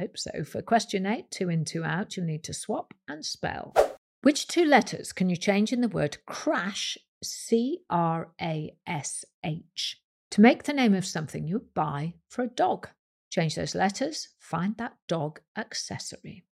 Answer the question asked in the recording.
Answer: if you change the C for an L and the R for an E, you get leash, L-E-A-S-H, leash or lead.